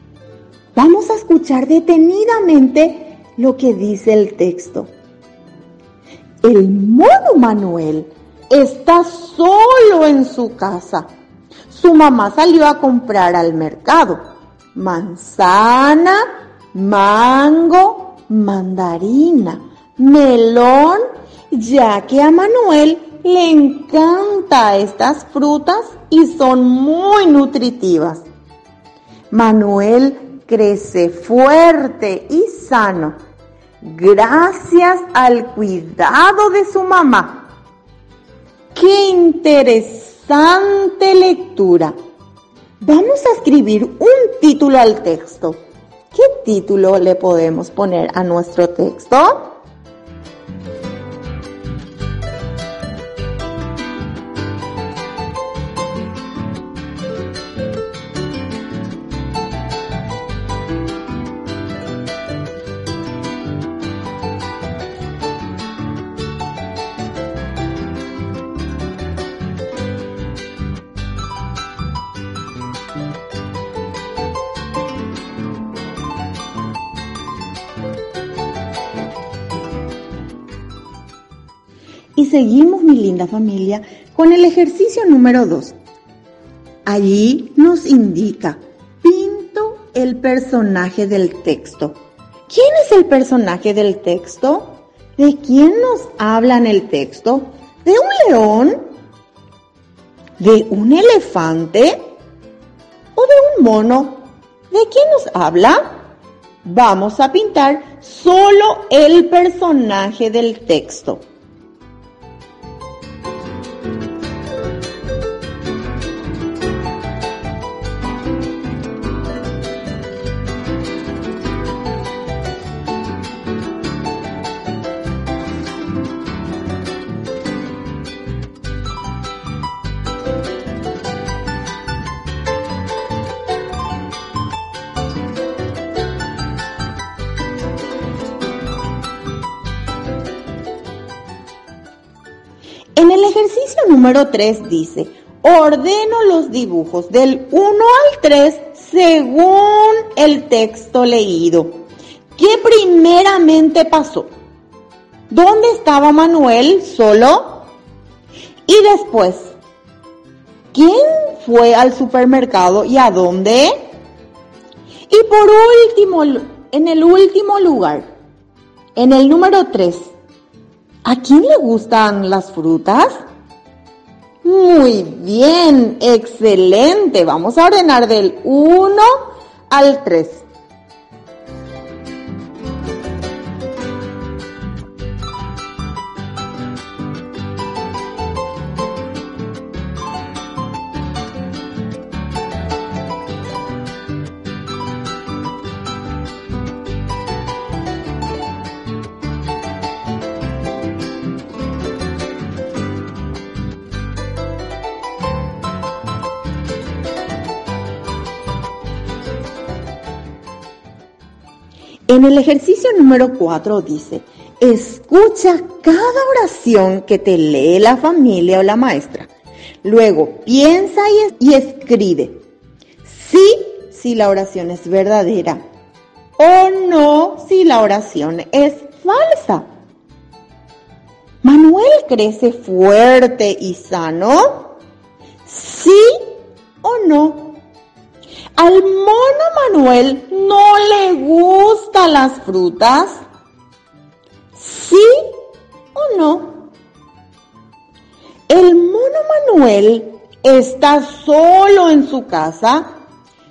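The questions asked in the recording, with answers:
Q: ¿De quién nos habla en el texto?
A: De un mono (el mono Manuel)

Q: ¿Manuel crece fuerte y sano?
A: Sí

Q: ¿Al mono Manuel no le gustan las frutas?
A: No

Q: ¿El mono Manuel está solo en su casa?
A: Sí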